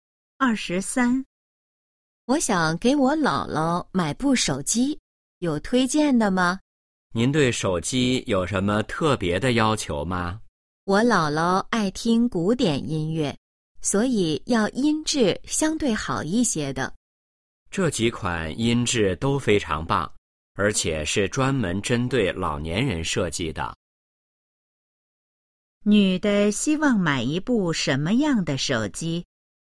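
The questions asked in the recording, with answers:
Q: 女的希望买一部什么样的手机?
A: 音质比较好的手机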